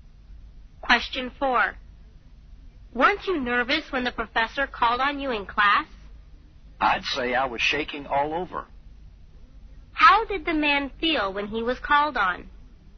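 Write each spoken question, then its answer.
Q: How did the man feel when he was called on?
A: Very nervous.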